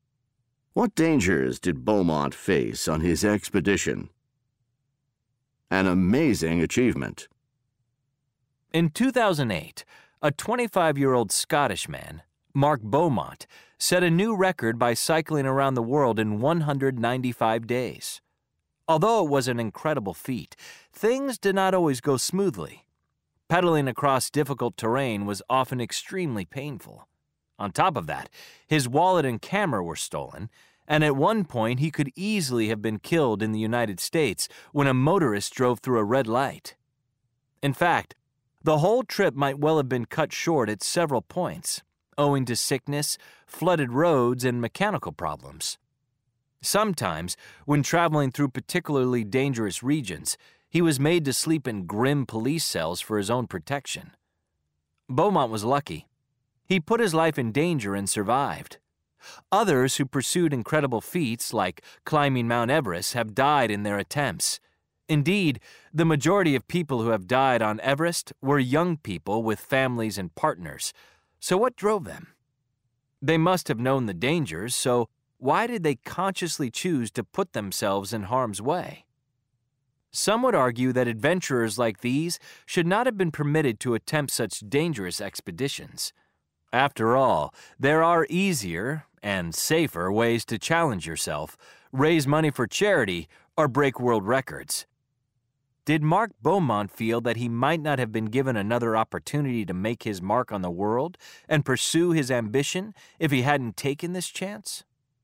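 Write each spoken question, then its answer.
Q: What dangers did Beaumont face on his expedition?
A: Painful terrain, theft of his wallet and camera, nearly being killed by a motorist, sickness, flooded roads, mechanical problems, and dangerous regions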